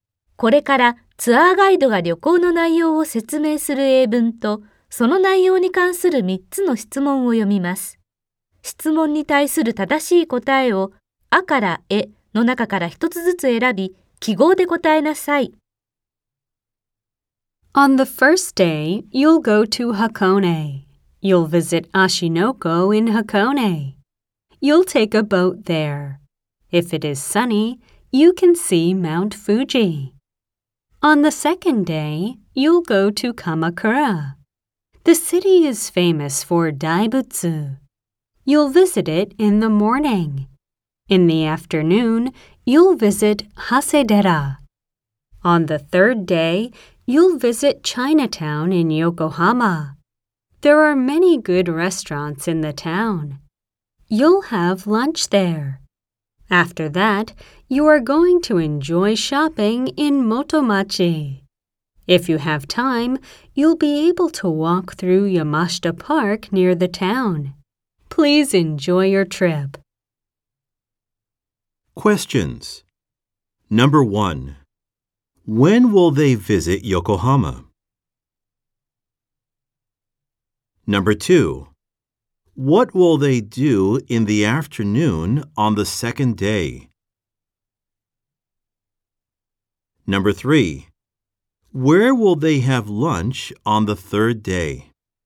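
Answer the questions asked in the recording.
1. On the third day
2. Visit Hasedera
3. In Chinatown in Yokohama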